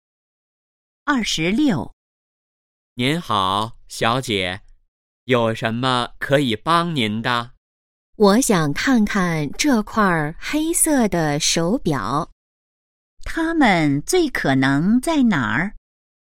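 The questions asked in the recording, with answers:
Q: 它们最可能在哪儿?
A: 商店(手表柜台)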